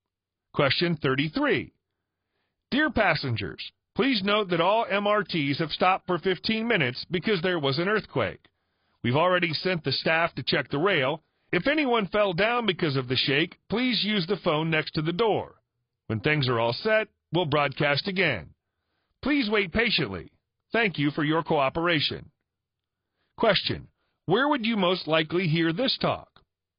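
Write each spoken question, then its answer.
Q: where would you most likely hear this talk?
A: On an MRT train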